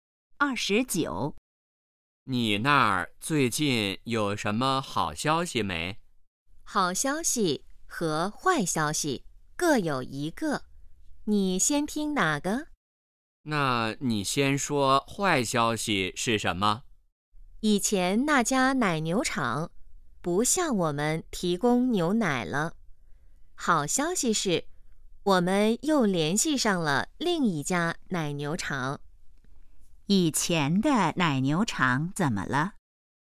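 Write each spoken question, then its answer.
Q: 以前的奶牛场怎么了?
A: 不提供牛奶了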